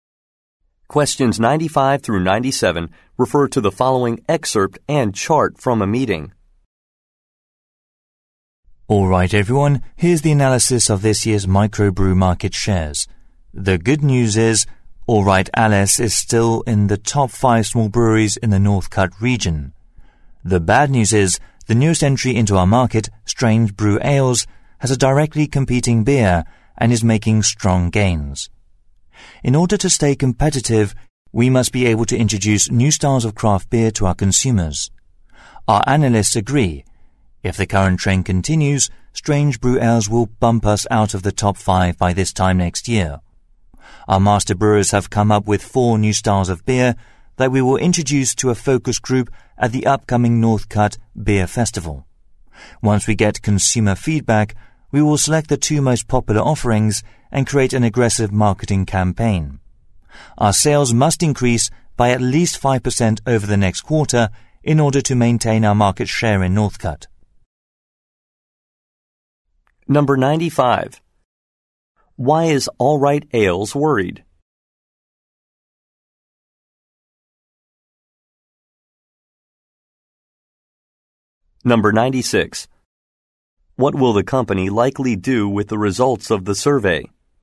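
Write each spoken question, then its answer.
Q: Why is All Right Ales worried?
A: A new competitor, Strange Brew Ales, is gaining market share

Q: What will the company likely do with the results of the survey?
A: Pick the 2 most popular beers and market them aggressively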